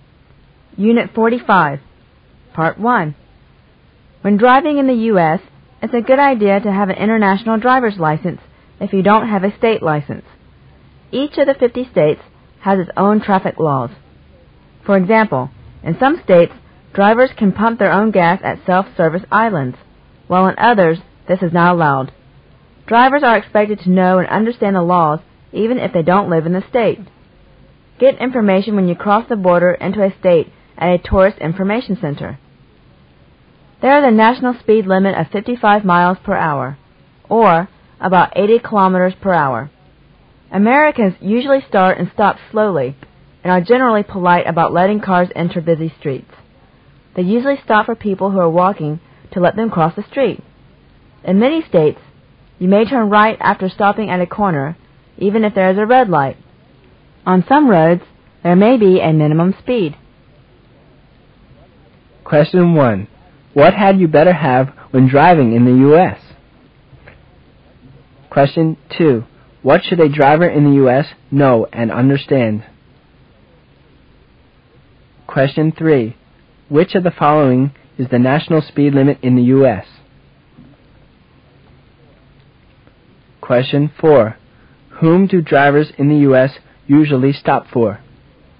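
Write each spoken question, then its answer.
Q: What had you better have when driving in the U.S.?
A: An international driver's license

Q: What should a driver in the U.S. know and understand?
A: The traffic laws of each state

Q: Which of the following is the national speed limit in the U.S.?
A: 55 miles per hour

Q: Whom do drivers in the U.S. usually stop for?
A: People walking across the street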